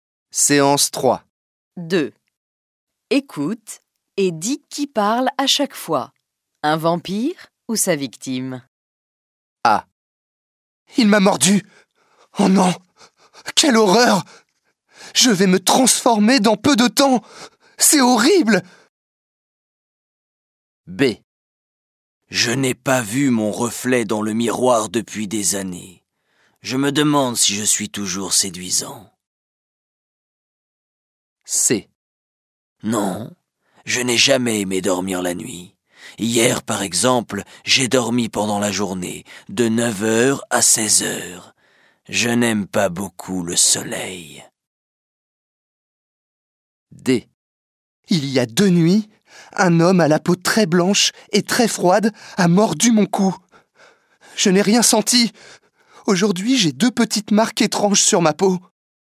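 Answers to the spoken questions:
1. sa victime
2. un vampire
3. un vampire
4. sa victime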